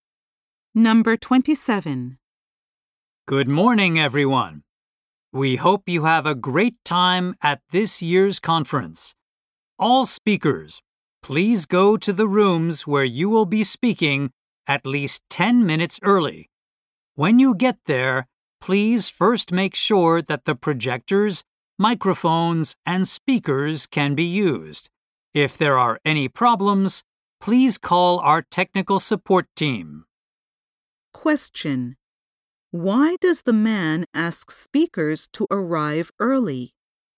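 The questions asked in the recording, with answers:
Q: Why does the man ask speakers to arrive early?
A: To check that the projectors, microphones, and speakers work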